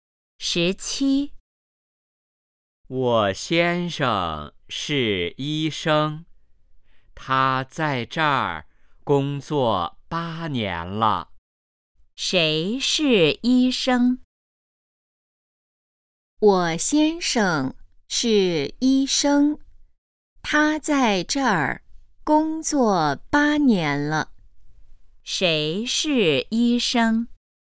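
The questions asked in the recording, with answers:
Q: 谁是医生?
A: 我先生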